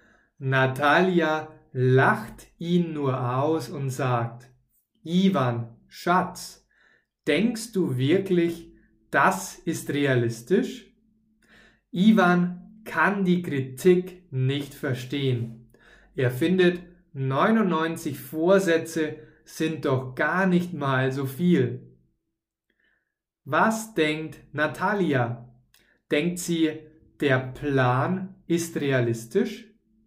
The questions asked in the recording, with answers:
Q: Was denkt Natalia? Denkt sie, der Plan ist realistisch?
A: Nein, sie denkt, der Plan ist nicht realistisch.